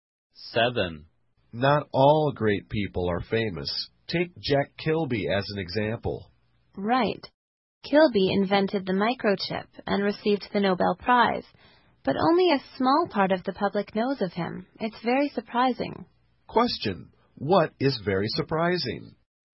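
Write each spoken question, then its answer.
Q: What is very surprising?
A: That only a small part of the public knows of Jack Kilby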